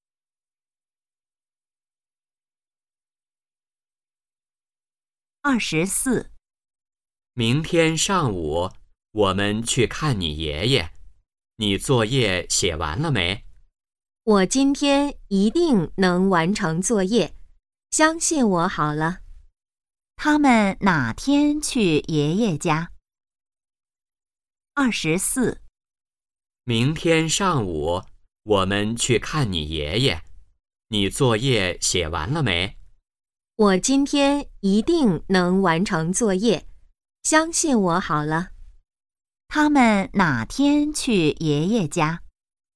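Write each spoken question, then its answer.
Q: 他们哪天去爷爷家?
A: 明天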